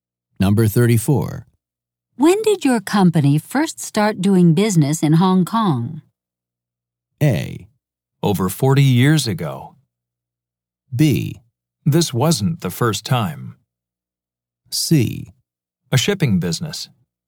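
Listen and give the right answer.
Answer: A: Over 40 years ago.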